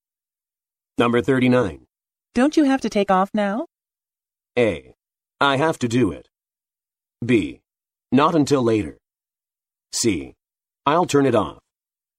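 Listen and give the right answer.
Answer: B: Not until later.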